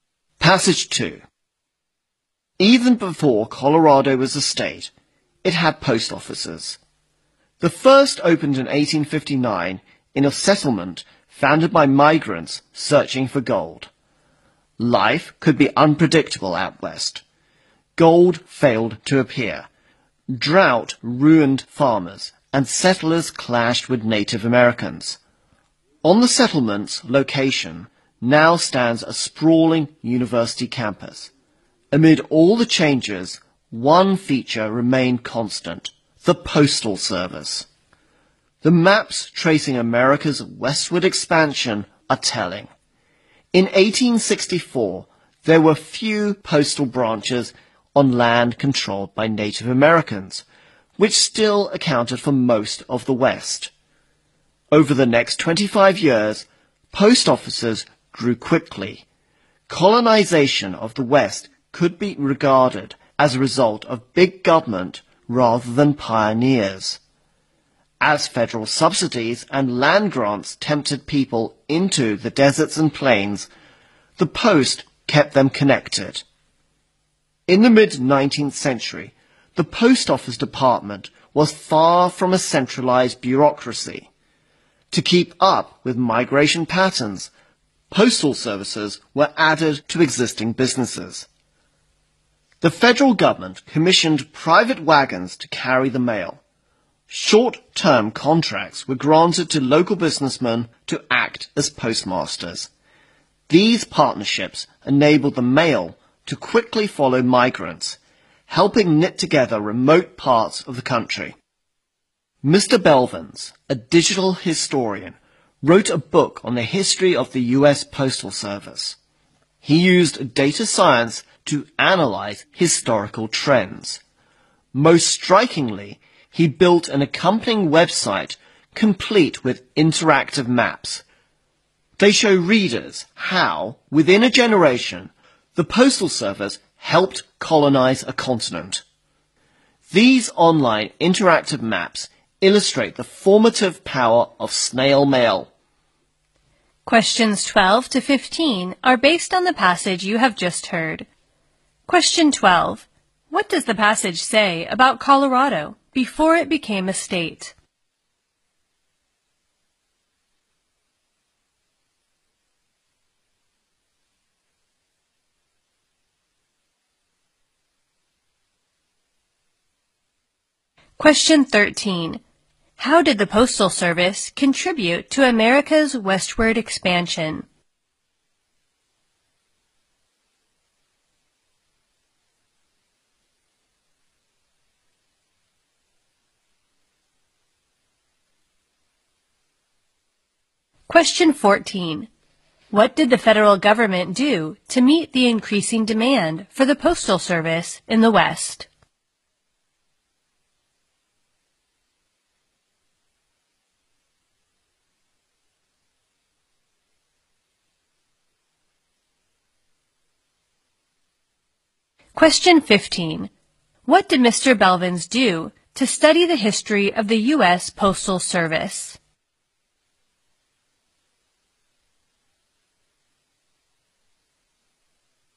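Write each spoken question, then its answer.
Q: What does the passage say about Colorado before it became a state?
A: It had post offices.

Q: How did the Postal Service contribute to America's westward expansion?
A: It kept settlers connected and knit together remote parts of the country.

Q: What did the federal government do to meet the increasing demand for the Postal Service in the West?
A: It partnered with private businesses: commissioned private wagons and made local businessmen postmasters.

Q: What did Mr.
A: He used data science to analyze historical trends.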